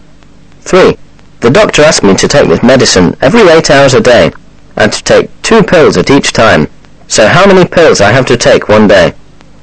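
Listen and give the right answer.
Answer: 6 pills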